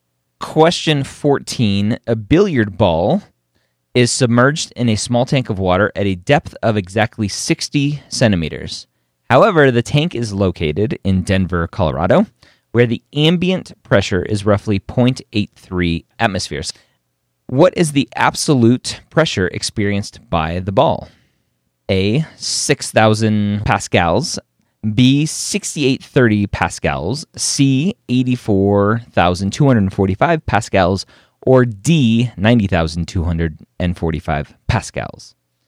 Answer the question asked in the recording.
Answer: then probably the answer is D, 90,000.